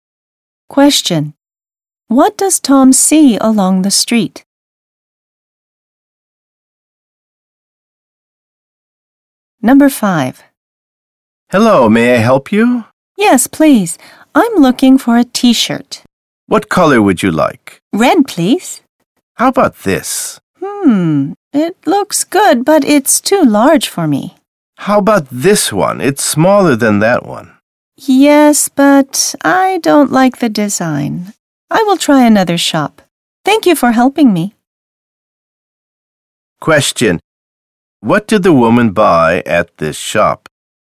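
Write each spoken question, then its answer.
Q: What did the woman buy at this shop?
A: Nothing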